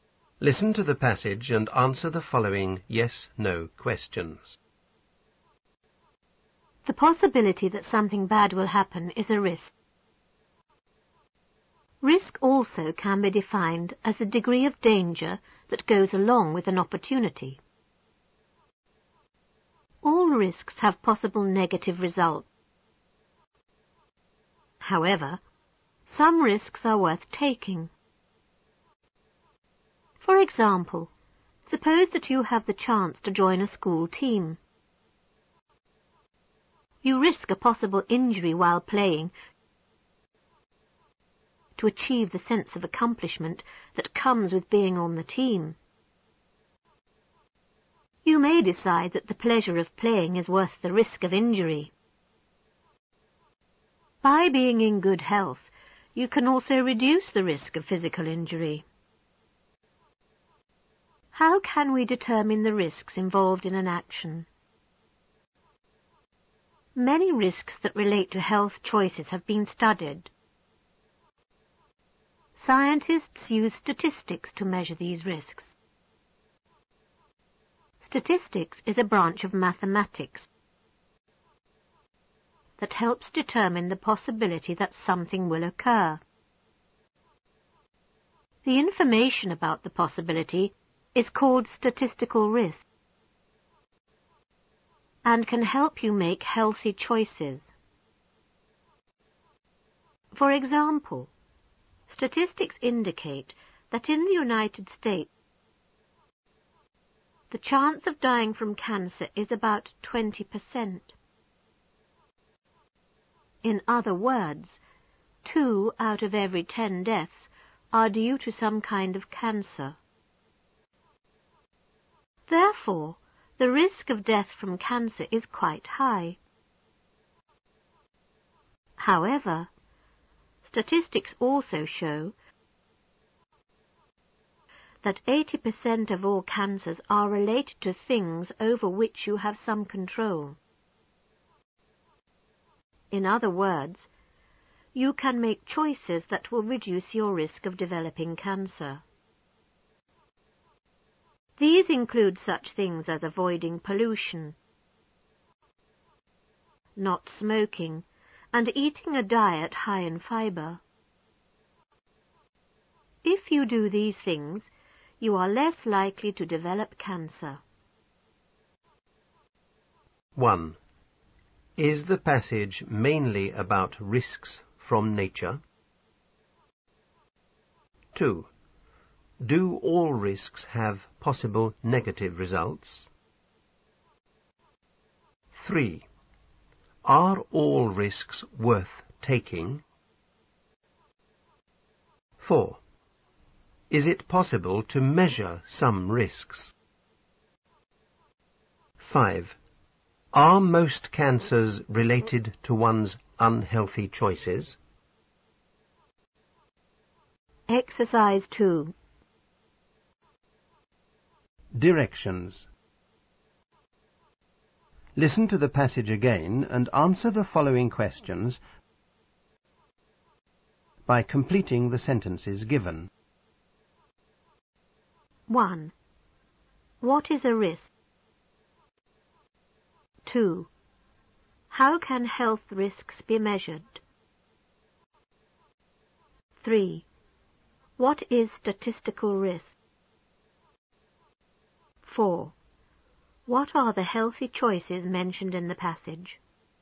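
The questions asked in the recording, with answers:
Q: Is the passage mainly about risks from nature?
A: No

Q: Do all risks have possible negative results?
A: Yes

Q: Are all risks worth taking?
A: No, only some risks are worth taking

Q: Is it possible to measure some risks?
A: Yes

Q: Are most cancers related to one's unhealthy choices?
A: Yes, 80% are related to things you have some control over

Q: What is a risk?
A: The possibility that something bad will happen

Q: How can health risks be measured?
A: By using statistics

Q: What is statistical risk?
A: Information about the possibility that something will occur

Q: What are the healthy choices mentioned in the passage?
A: Avoiding pollution, not smoking, and eating a diet high in fiber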